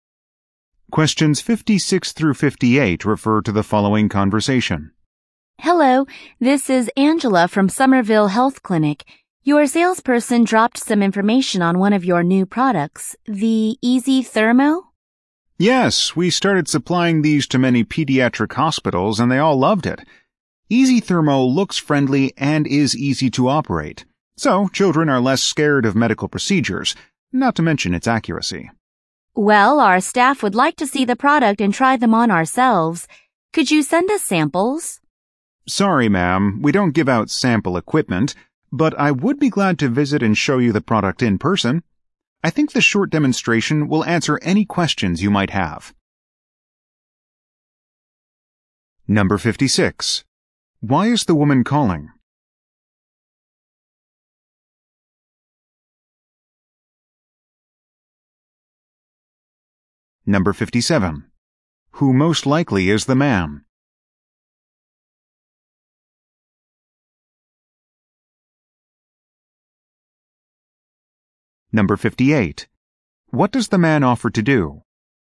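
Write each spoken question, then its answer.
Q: Why is the woman calling?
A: To request product samples

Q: Who most likely is the man?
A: A medical equipment sales representative

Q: What does the man offer to do?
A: Visit and demonstrate the product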